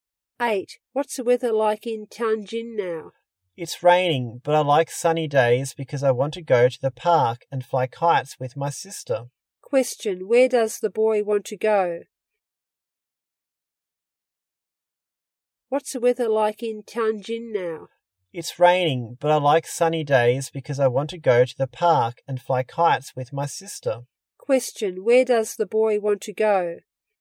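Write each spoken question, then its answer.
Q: Question: Where does the boy want to go?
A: To the park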